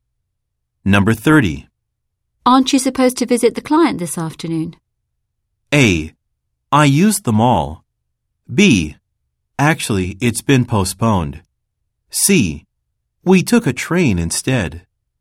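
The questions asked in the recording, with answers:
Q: Aren't you supposed to visit the client this afternoon?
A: B: Actually, it's been postponed.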